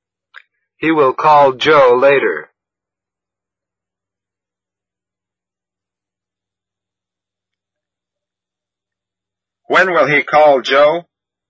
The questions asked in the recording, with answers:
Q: When will he call Joe?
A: He will call Joe later.